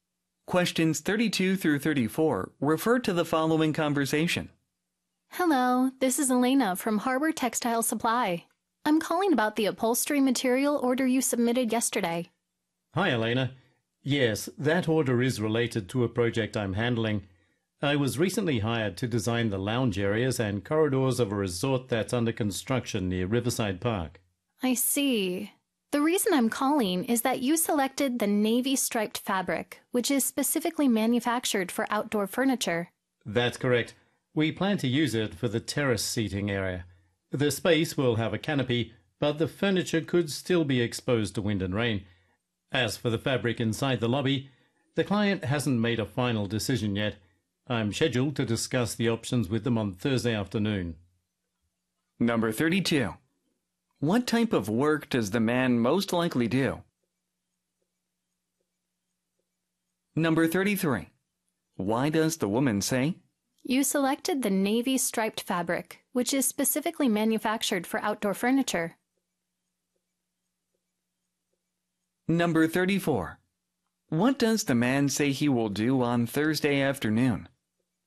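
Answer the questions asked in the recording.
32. Interior designer
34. Discuss the lobby fabric options with the client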